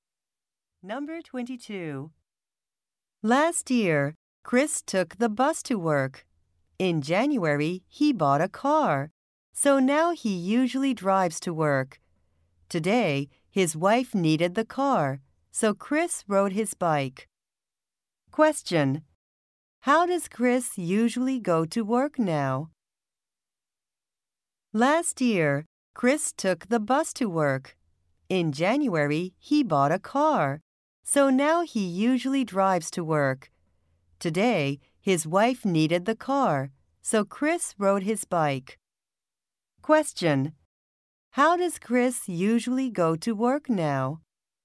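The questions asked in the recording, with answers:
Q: How does Chris usually go to work now?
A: By car.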